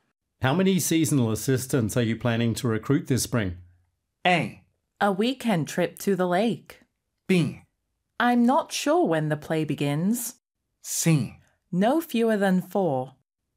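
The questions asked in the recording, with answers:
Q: How many seasonal assistants are you planning to recruit this spring?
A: C: No fewer than four.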